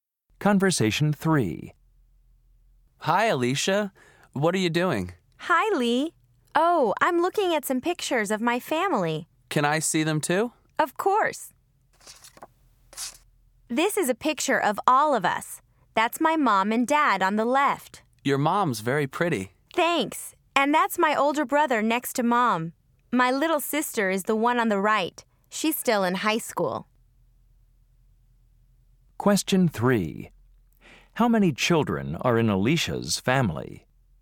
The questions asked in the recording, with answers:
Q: How many children are in Alicia's family?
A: So your parents had 3 children?